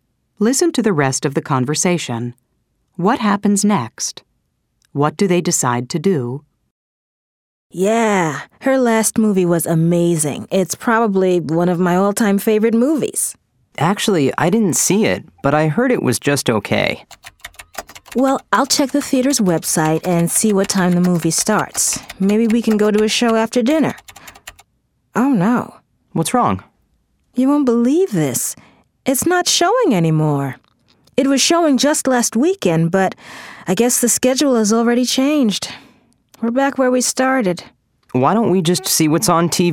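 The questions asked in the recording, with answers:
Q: What happens next? What do they decide to do?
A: The movie isn't showing anymore, so they decide to see what's on TV tonight.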